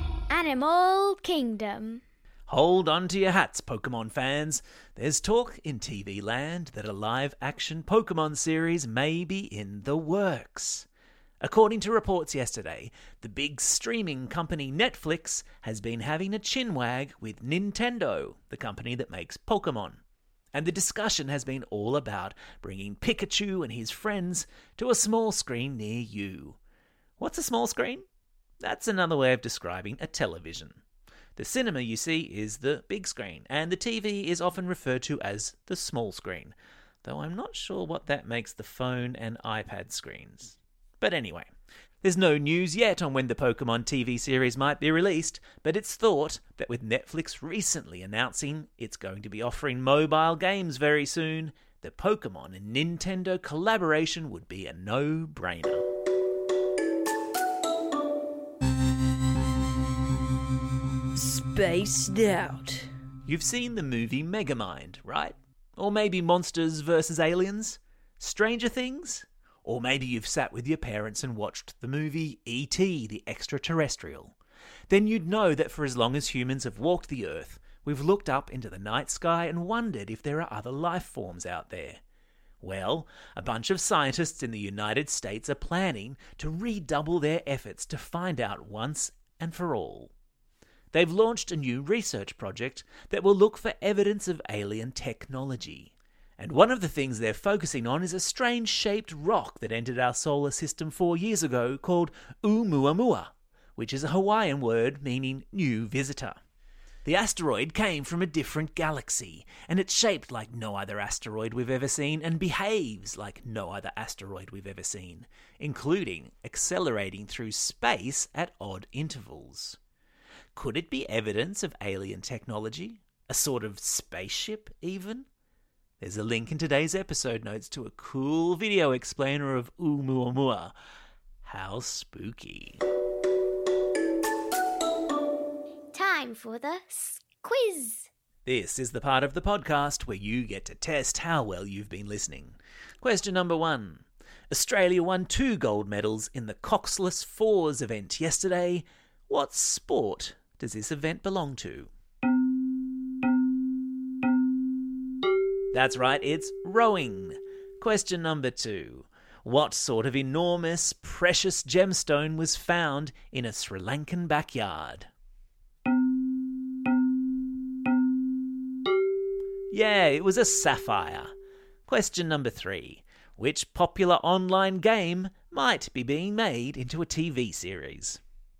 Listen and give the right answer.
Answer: That's right, it's Pokemon.